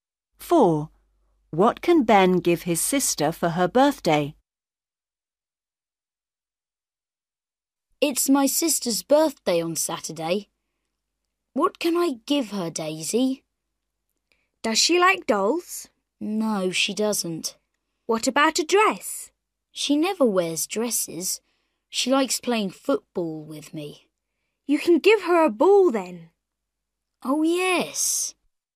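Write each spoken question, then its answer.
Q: What can Ben give his sister for her birthday?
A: a ball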